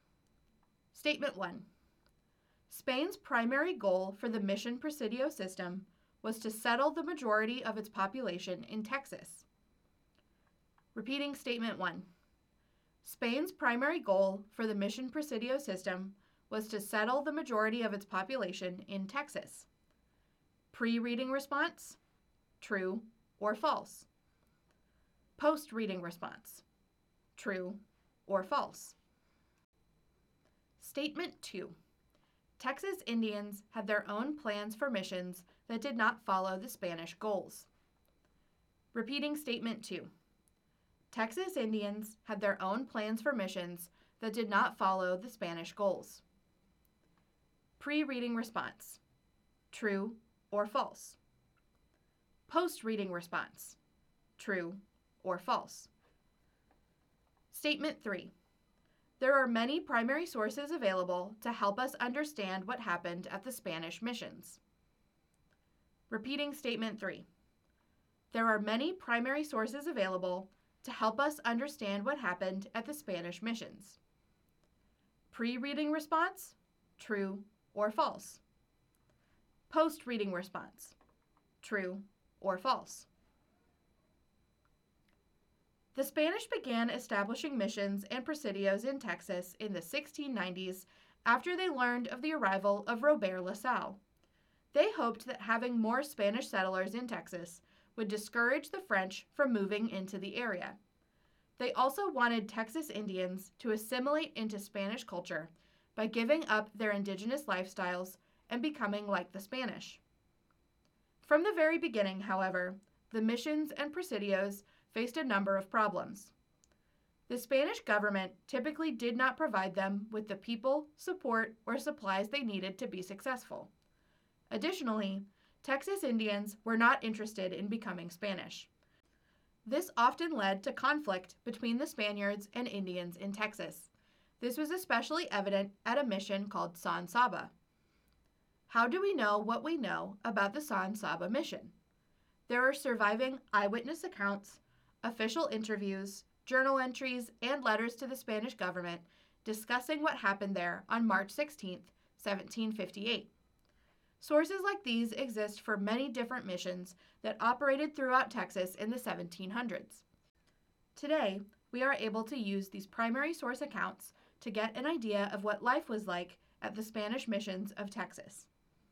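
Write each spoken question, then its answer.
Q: Spain's primary goal for the Mission Presidio system was to settle the majority of its population in Texas.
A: False

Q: Texas Indians had their own plans for missions that did not follow the Spanish goals.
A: True

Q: There are many primary sources available to help us understand what happened at the Spanish missions.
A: True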